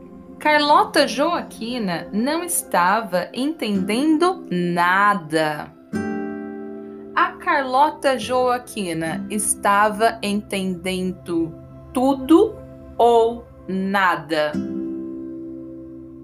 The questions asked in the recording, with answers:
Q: Carlota Joaquina estava entendendo tudo ou nada?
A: Nada. A Carlota Joaquina não estava entendendo nada.